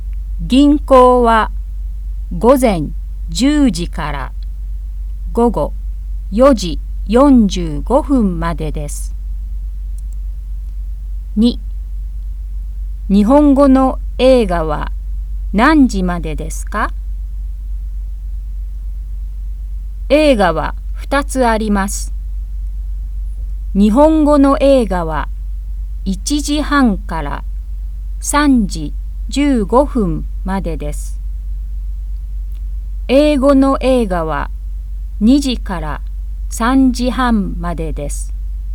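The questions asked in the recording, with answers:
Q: 日本語の映画は何時までですか?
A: 3時15分まで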